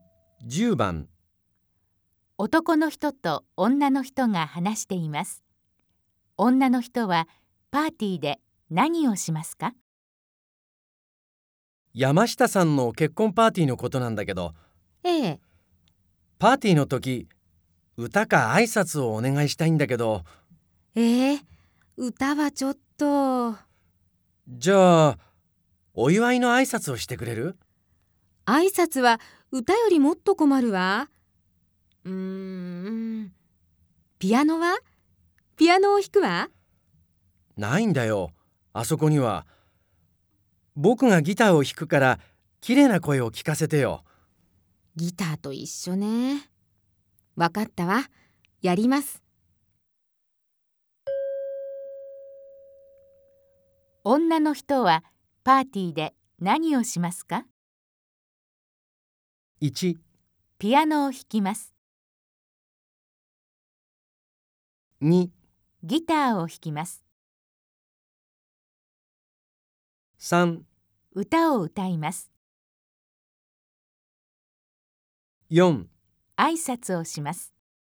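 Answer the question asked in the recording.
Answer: 3: 歌を歌います。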